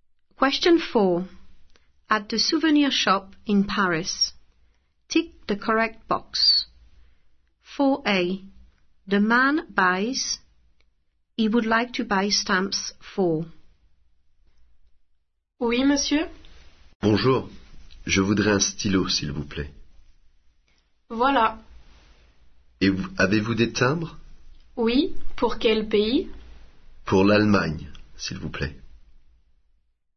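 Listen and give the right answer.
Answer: a pen; Germany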